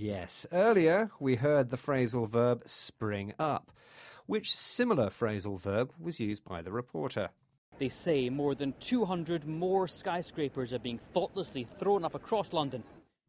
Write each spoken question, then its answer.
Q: Which similar phrasal verb was used by the reporter?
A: Thrown up.